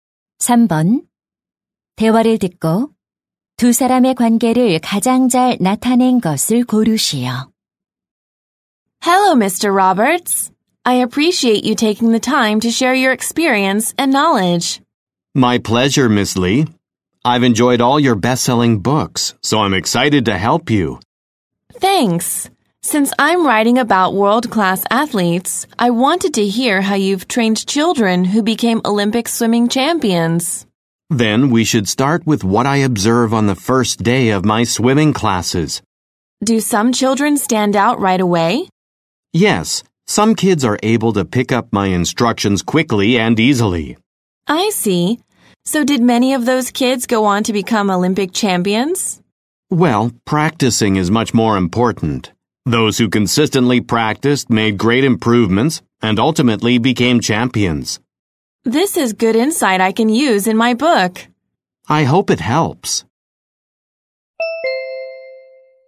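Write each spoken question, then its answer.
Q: 대화를 듣고 두 사람의 관계를 가장 잘 나타낸 것을 고르시오.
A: 작가 - 수영 코치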